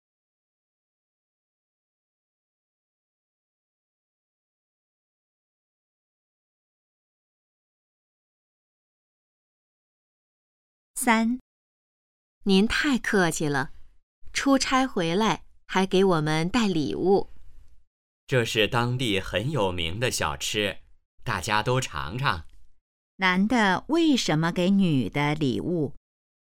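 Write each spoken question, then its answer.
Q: 男的为什么给女的礼物?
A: 他出差回来,带当地有名的小吃给大家尝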